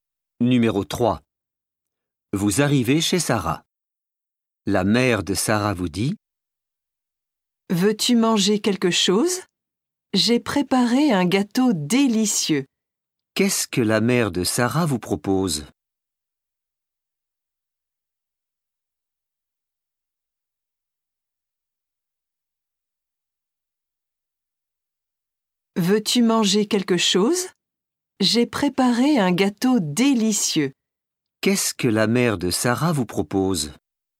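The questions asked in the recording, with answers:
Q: Qu'est-ce que la mère de Sarah vous propose?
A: Un gâteau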